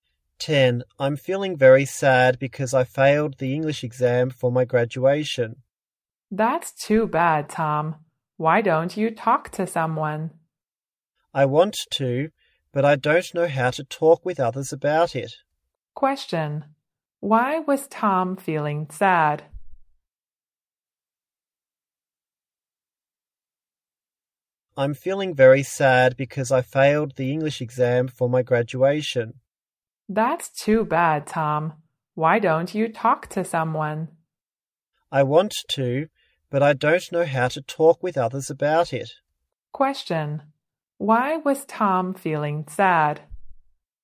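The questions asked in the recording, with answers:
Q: Why was Tom feeling sad?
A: He failed the English exam for his graduation.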